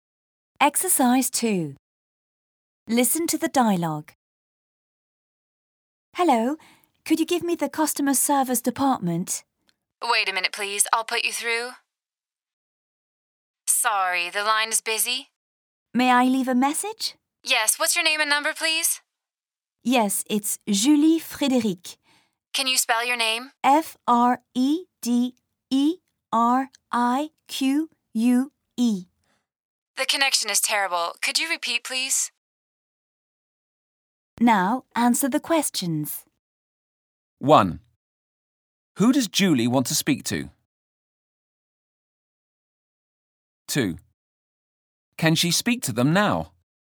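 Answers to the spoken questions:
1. The customer service department
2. No, the line is busy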